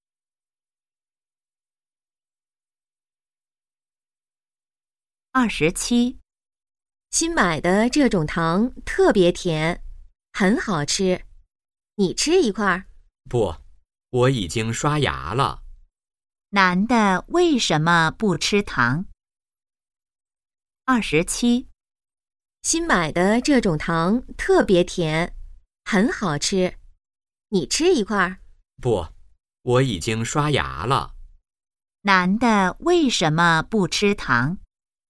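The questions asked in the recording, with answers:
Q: 男的为什么不吃糖?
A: 已经刷牙了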